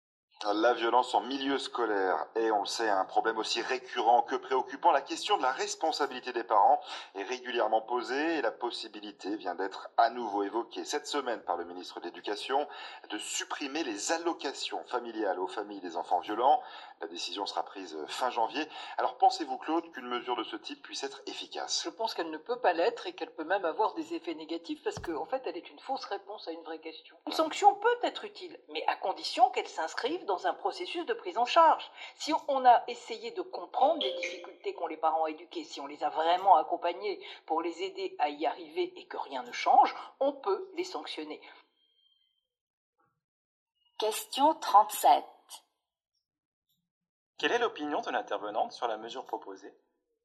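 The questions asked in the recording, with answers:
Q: Quelle est l'opinion de l'intervenante sur la mesure proposée ?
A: Elle pense que la mesure ne peut pas être efficace et peut même avoir des effets négatifs : c'est une fausse réponse à une vraie question.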